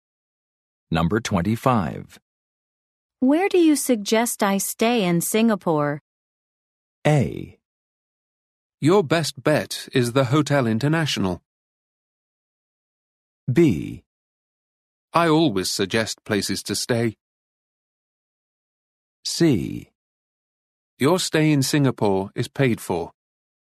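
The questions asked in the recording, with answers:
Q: Where do you suggest I stay in Singapore?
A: A: Your best bet is the Hotel International.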